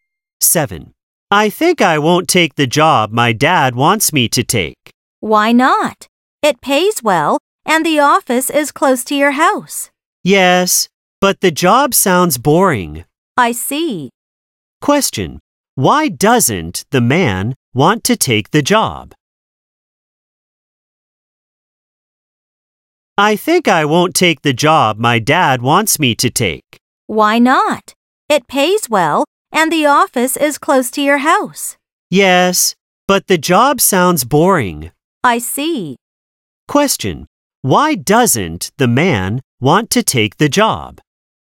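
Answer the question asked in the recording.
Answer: The job sounds boring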